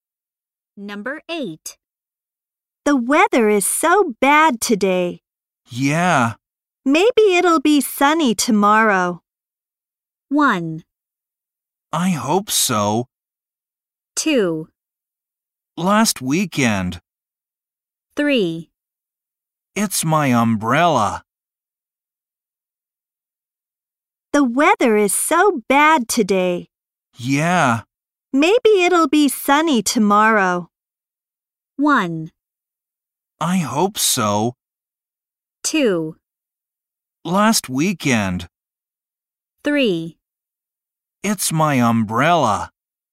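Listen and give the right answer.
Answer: 1: I hope so.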